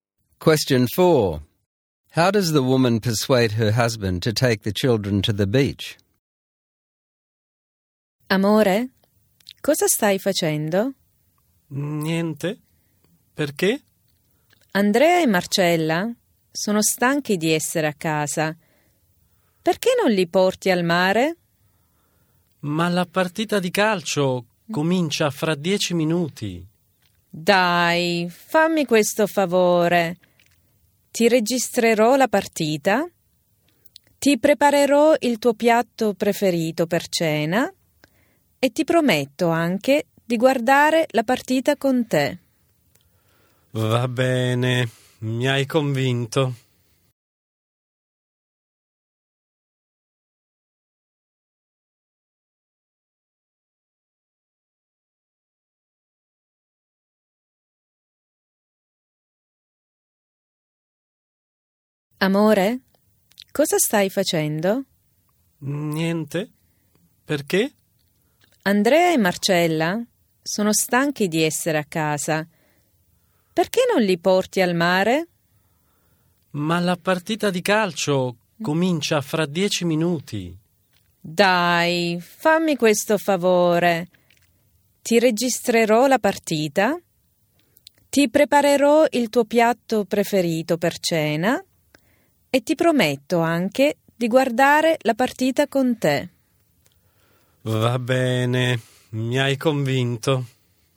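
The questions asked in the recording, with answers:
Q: How does the woman persuade her husband to take the children to the beach?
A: She promises to record the match for him, make his favourite dish for dinner and watch the match with him.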